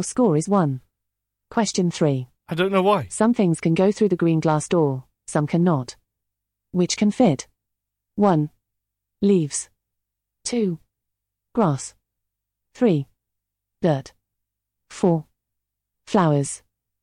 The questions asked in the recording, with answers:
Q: Which can fit?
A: The correct answer is 2. Grass.